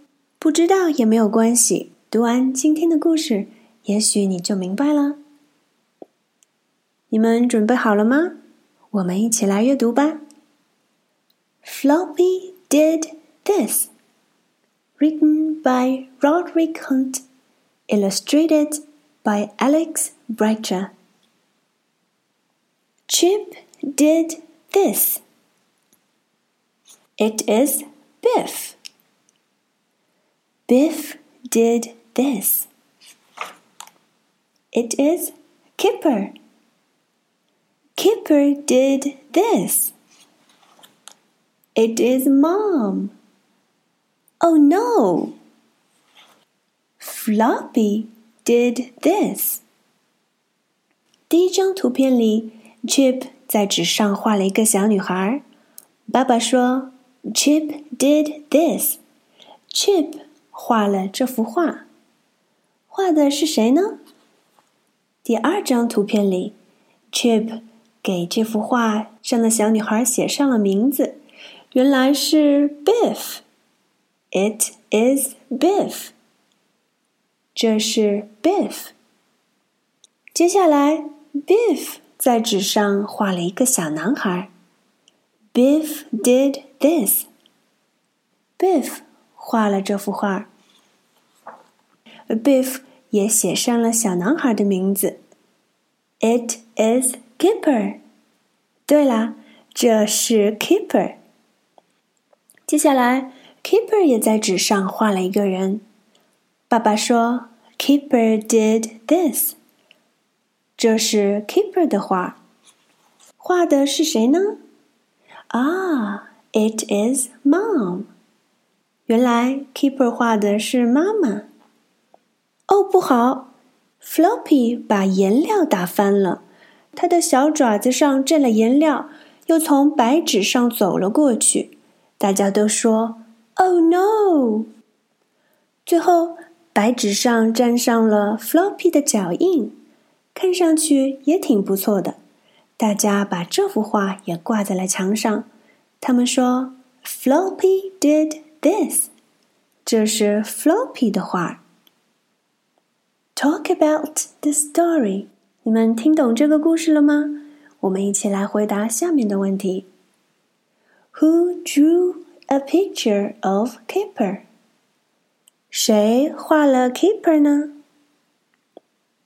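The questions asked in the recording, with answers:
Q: Who drew a picture of Kipper?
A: Biff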